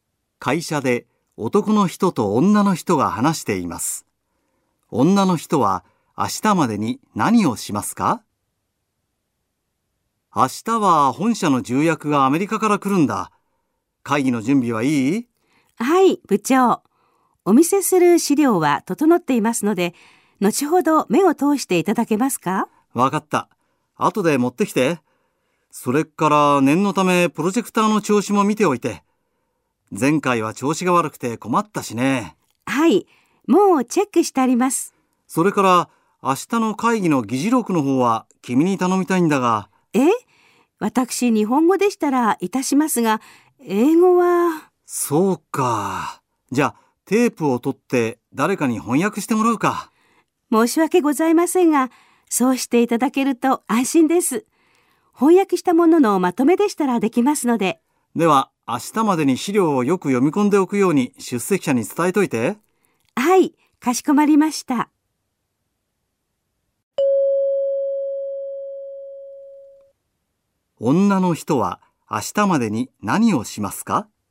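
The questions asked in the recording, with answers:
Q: 女の人は明日までに何をしますか?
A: 出席者に資料をよく読み込んでおくように伝える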